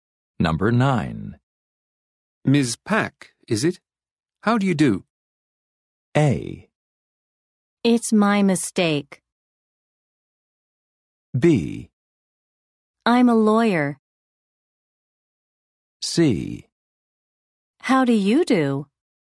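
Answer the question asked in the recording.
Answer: C: How do you do?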